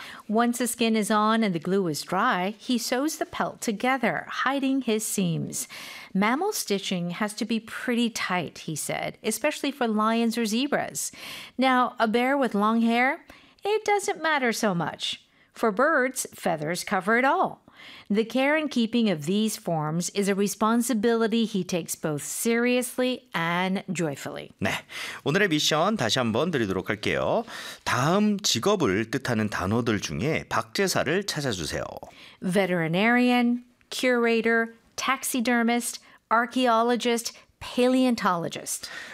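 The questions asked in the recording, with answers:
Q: 다음 직업을 뜻하는 단어들 중에 박제사를 찾아주세요.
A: taxidermist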